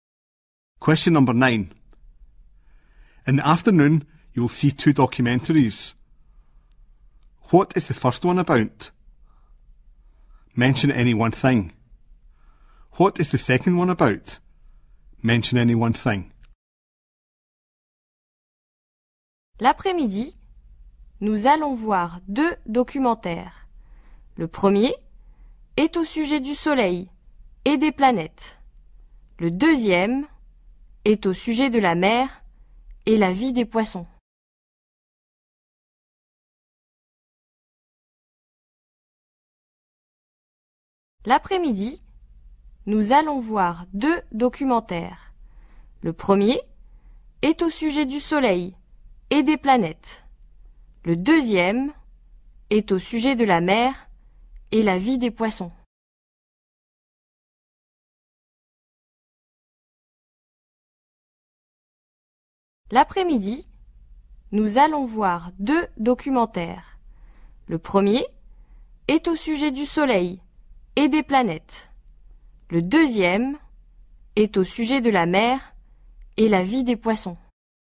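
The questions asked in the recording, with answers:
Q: What is the first one about?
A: The sun and the planets

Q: What is the second one about?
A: The sea and the life of fish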